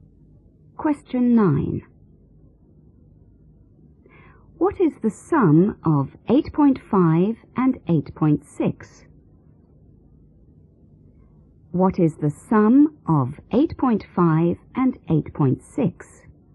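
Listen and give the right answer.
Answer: 17.1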